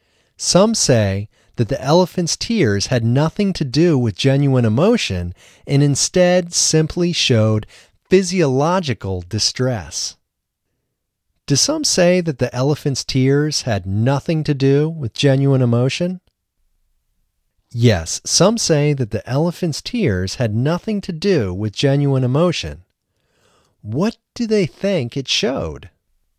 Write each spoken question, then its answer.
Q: What do they think it showed?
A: They think it showed physiological distress.